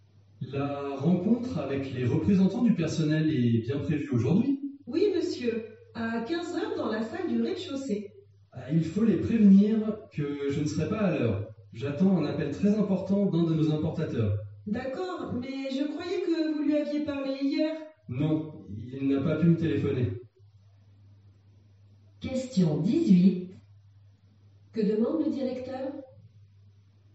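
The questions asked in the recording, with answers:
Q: Que demande le directeur ?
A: Qu'on prévienne les représentants du personnel qu'il ne sera pas à l'heure à la réunion.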